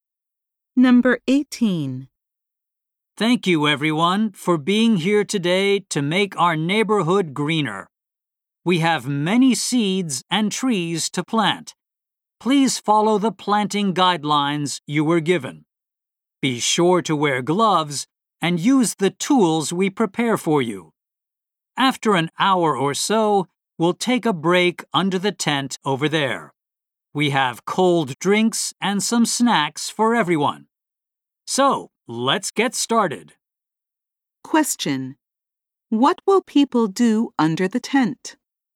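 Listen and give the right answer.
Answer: Take a break and have cold drinks and snacks.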